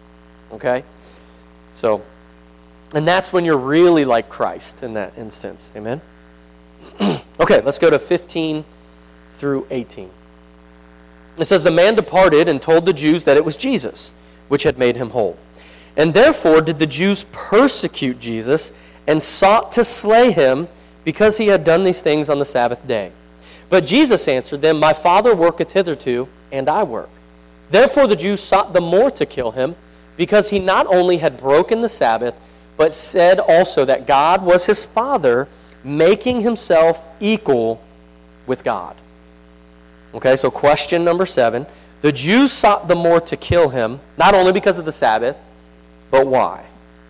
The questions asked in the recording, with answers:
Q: The Jews sought the more to kill him, not only because of the Sabbath, but why?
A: Made himself equal with God.